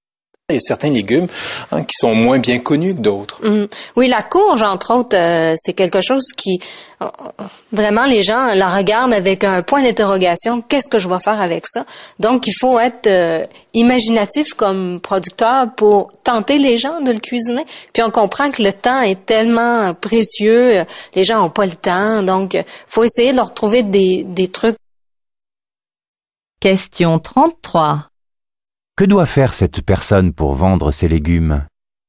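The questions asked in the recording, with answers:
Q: Que doit faire cette personne pour vendre ses légumes ?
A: Être imaginatif et trouver des astuces pour donner envie de les cuisiner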